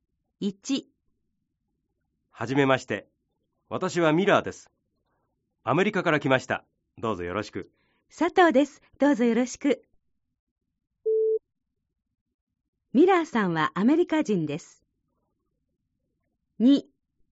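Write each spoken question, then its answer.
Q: ミラーさんはアメリカ人です。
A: ○ (正しい)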